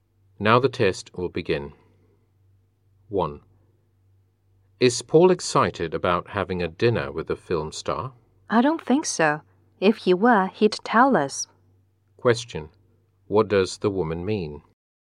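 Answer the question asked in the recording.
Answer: Paul is not excited about it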